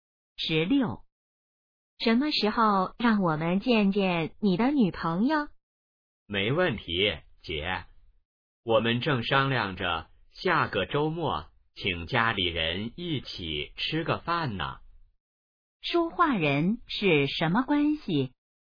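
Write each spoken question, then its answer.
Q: 说话人是什么关系?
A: 姐弟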